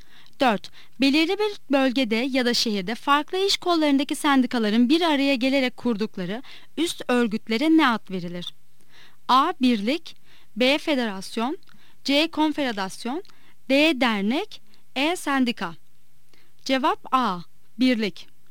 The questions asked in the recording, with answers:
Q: Belirli bir bölgede ya da şehirde farklı iş kollarındaki sendikaların bir araya gelerek kurdukları üst örgütlere ne ad verilir?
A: Cevap A. Birlik.